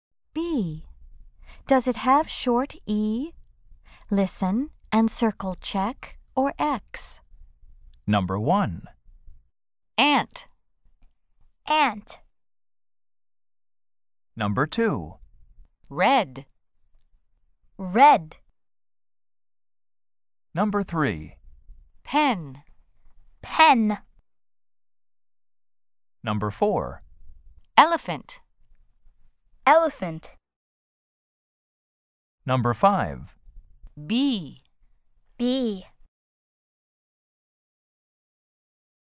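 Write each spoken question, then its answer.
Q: Elephant.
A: Yes (check)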